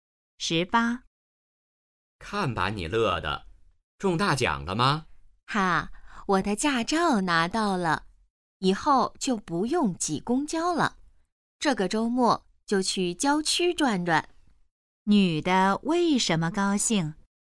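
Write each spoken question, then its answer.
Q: 女的为什么高兴?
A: 她拿到驾照了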